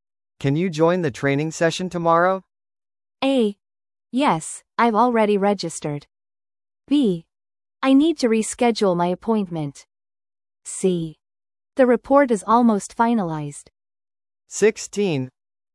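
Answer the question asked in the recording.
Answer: A: Yes, I've already registered.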